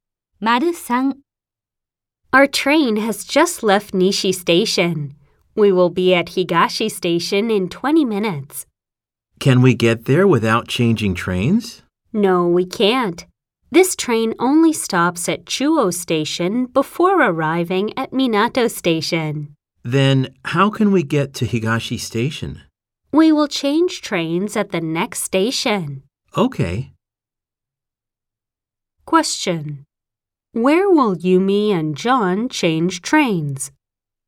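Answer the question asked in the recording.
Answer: At Chuo Station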